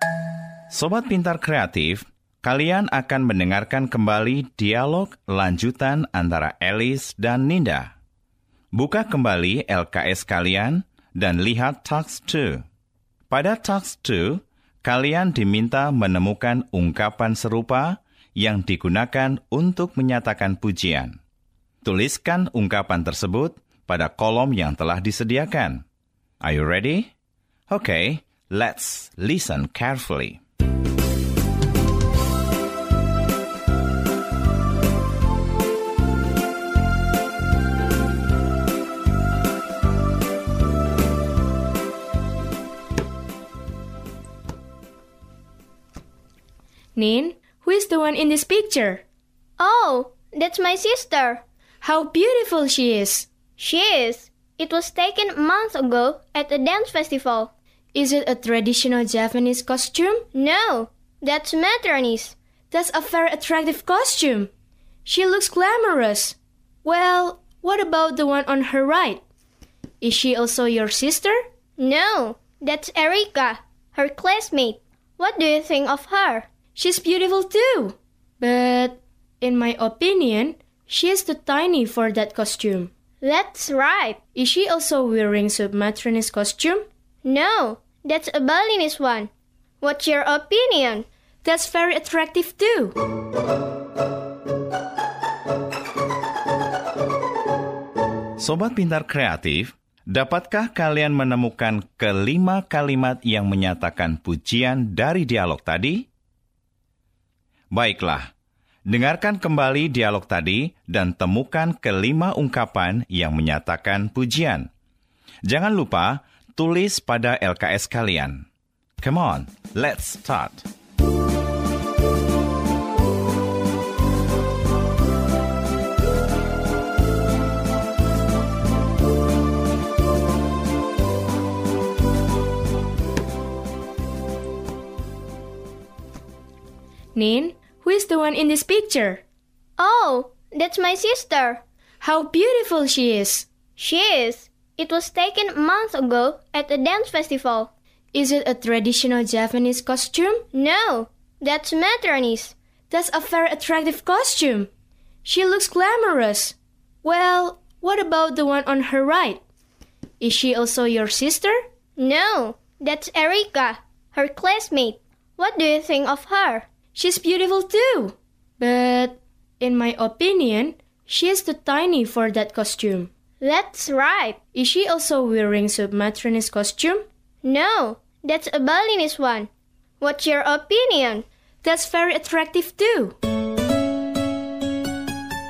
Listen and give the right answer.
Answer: Yang pertama adalah, how beautiful she is. Yang kedua, that's a very attractive costume. Yang ketiga, she looks glamorous. Berikutnya, yang keempat, she's beautiful too. Yang kelima atau yang terakhir, that's attractive too.